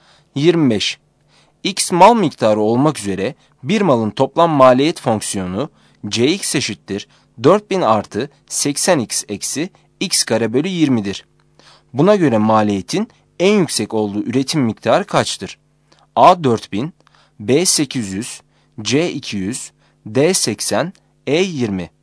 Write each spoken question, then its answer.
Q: Buna göre maliyetin en yüksek olduğu üretim miktarı kaçtır?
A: Yanıt B'dir.